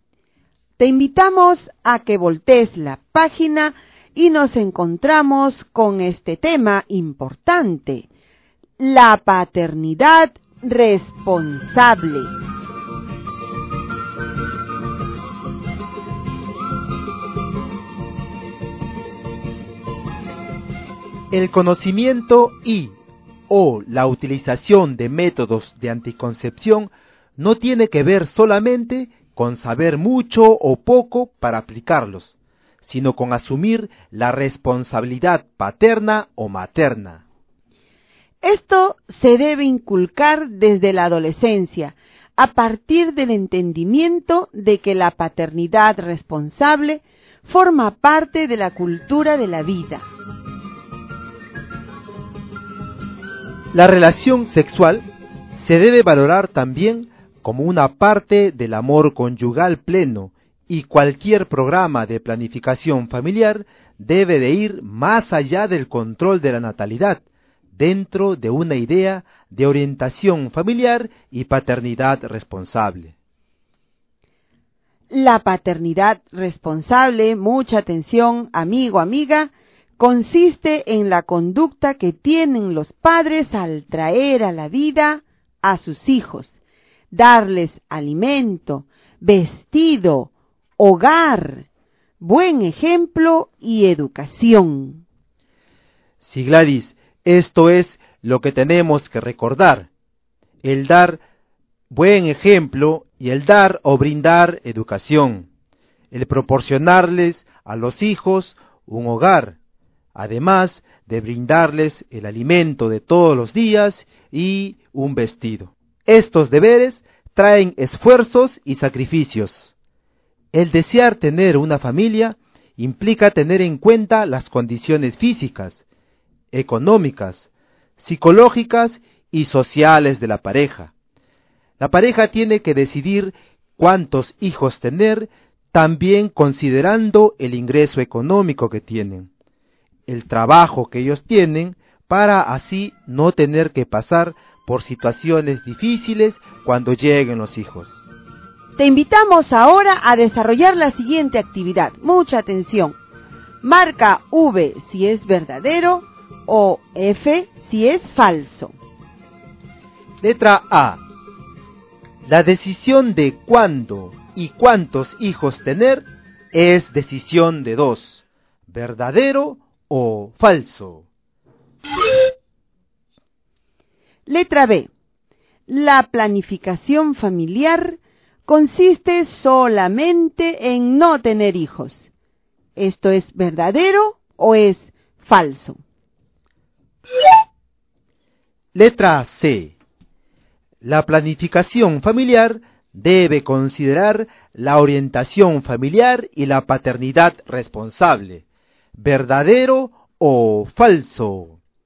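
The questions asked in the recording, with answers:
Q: La decisión de cuándo y cuántos hijos tener es decisión de dos.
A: Verdadero

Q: La planificación familiar consiste solamente en no tener hijos.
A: Falso

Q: La planificación familiar debe considerar la orientación familiar y la paternidad responsable.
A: Verdadero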